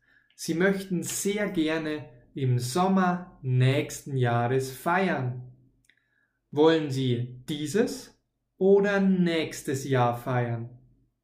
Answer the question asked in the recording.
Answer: Nächstes Jahr.